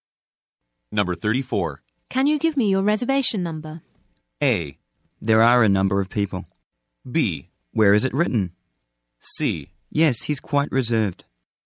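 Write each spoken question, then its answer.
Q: Can you give me your reservation number?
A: B: Where is it written?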